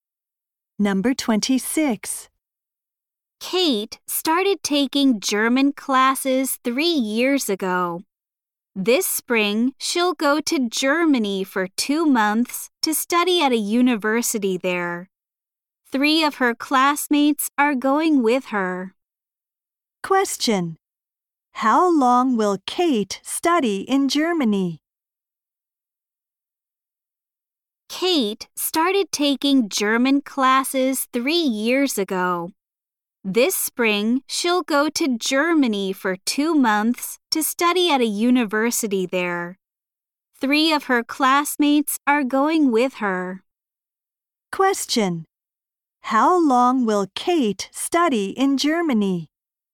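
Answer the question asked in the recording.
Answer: For 2 months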